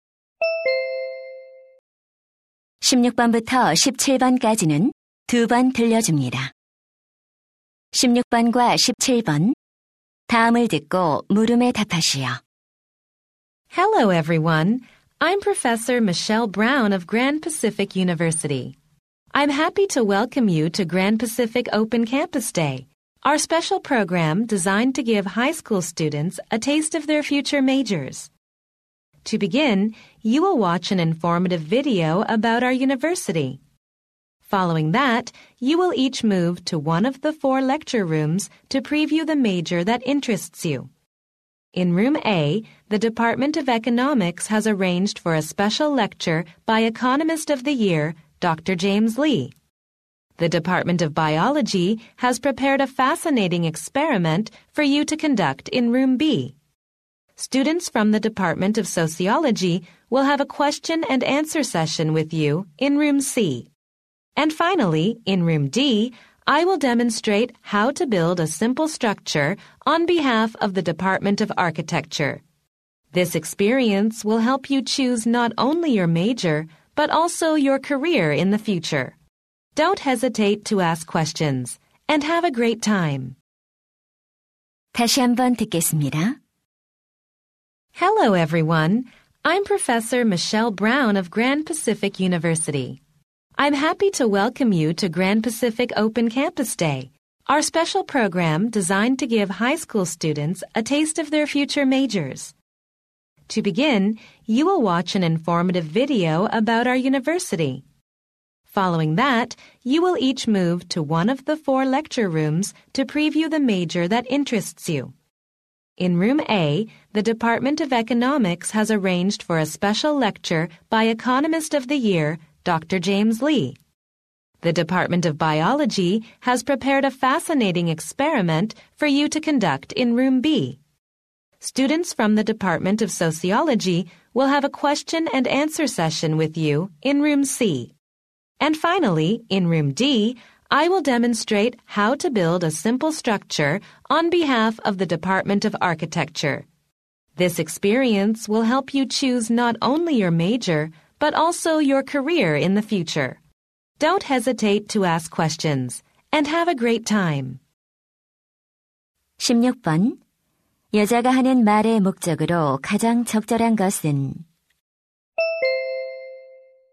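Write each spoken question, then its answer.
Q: 여자가 하는 말의 목적으로 가장 적절한 것은?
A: 오픈 캠퍼스 데이 프로그램을 소개하려고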